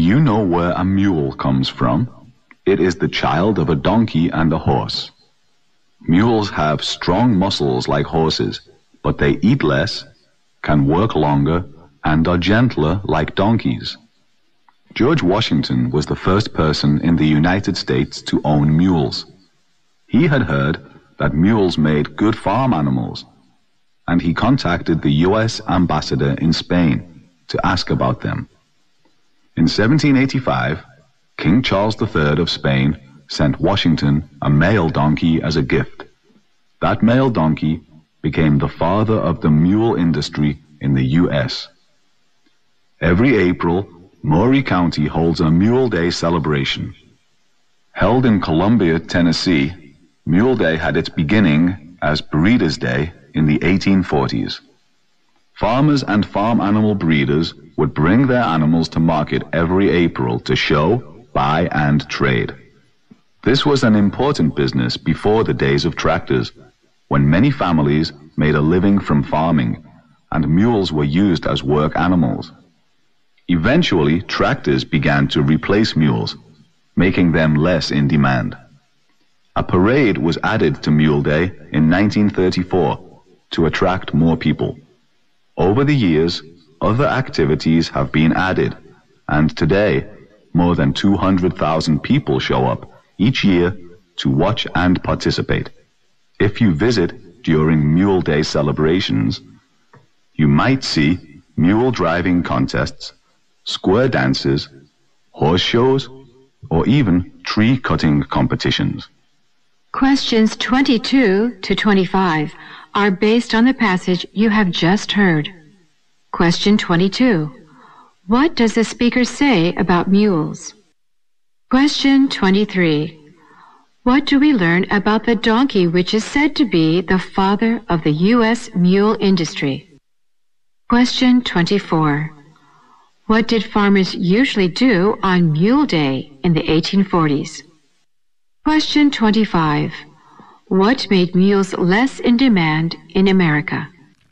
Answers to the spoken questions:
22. So it is the child of a donkey and a horse.
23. In 1785, the King Charles III of Spain sent a donkey as a gift.
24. Animals were brought to market in April to show and to buy and trade
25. the popularity of tractors finally replace the mules